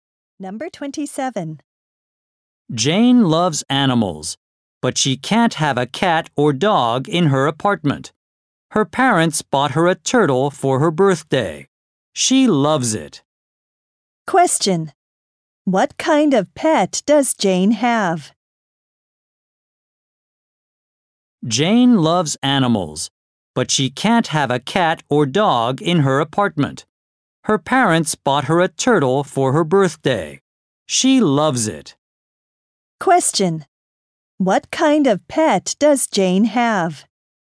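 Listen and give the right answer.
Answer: A turtle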